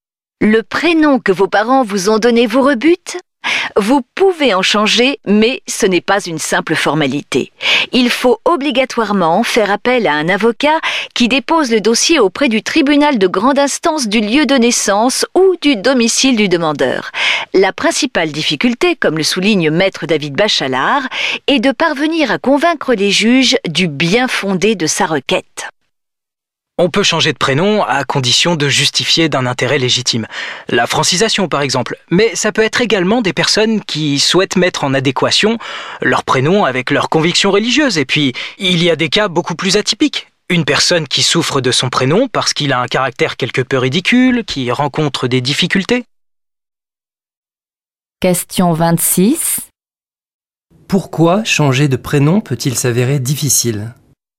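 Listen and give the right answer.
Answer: Parce qu'il faut convaincre les juges du bien-fondé de sa requête (justifier d'un intérêt légitime).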